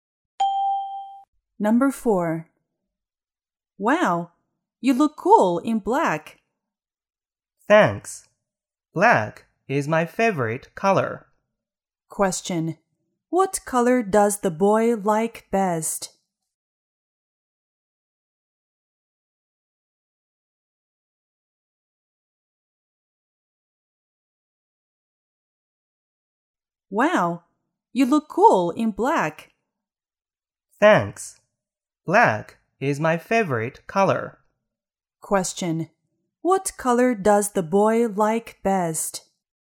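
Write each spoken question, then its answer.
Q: What color does the boy like best?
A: Black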